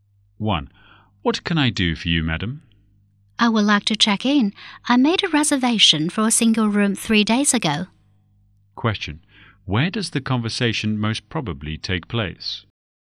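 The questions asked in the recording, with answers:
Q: Where does the conversation most probably take place?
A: At a hotel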